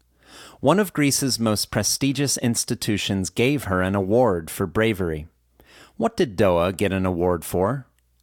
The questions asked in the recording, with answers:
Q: What did Doa get an award for?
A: Doa got an award for bravery from one of Greece's most prestigious institutions.